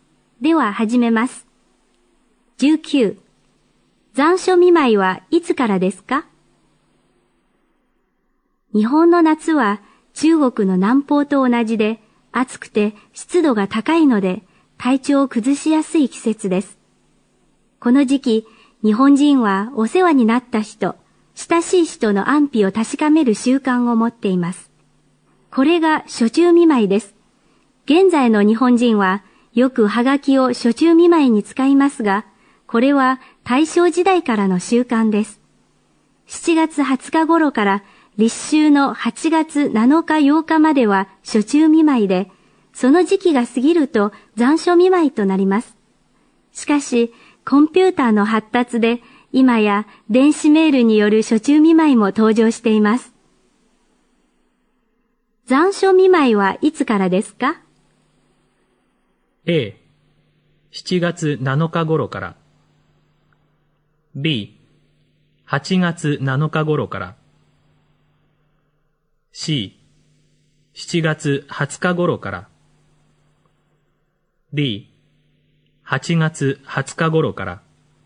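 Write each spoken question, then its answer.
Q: 残暑見舞いはいつからですか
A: B: 8月7日頃から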